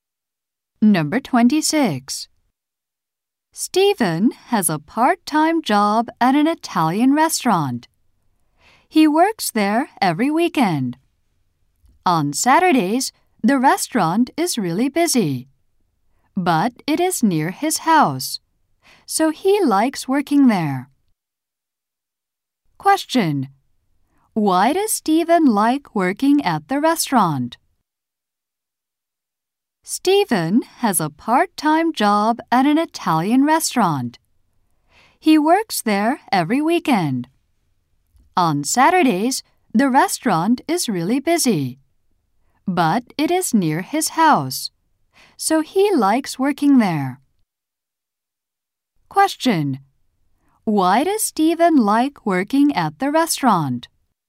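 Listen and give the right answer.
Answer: It is near his house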